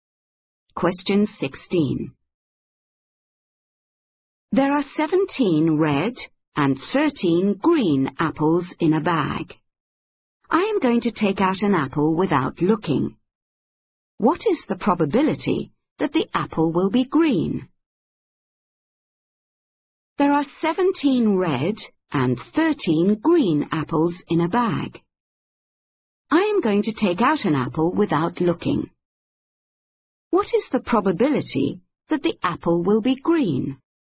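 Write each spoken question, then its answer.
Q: What is the probability that the apple will be green?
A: 13/30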